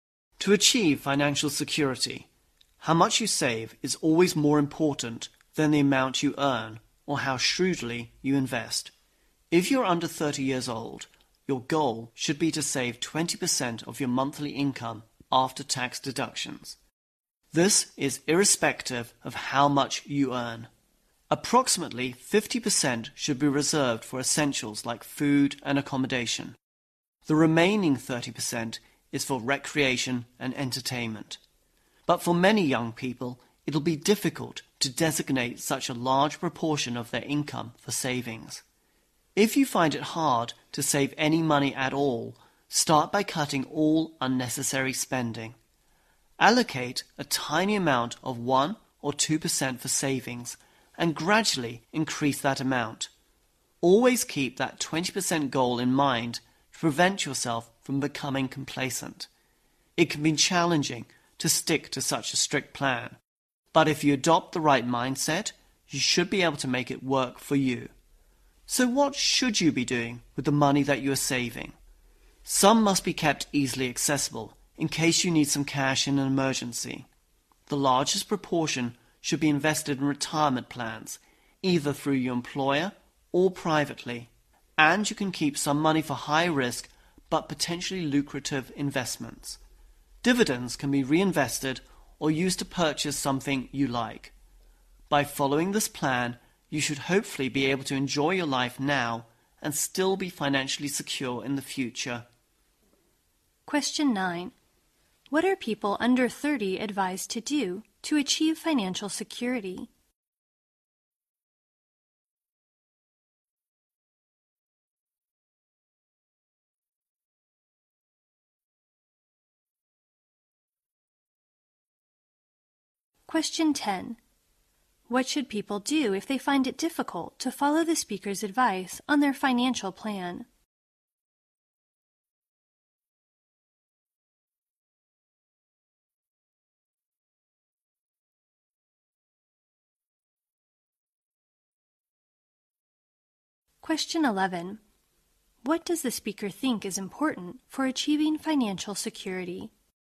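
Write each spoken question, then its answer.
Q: What are people under 30 advised to do to achieve financial security?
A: Save 20% of their monthly after-tax income

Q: What should people do if they find it difficult to follow the speaker's advice on their financial plan?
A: Cut all unnecessary spending and start by saving 1 or 2%, then gradually increase it

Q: What does the speaker think is important for achieving financial security?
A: How much you save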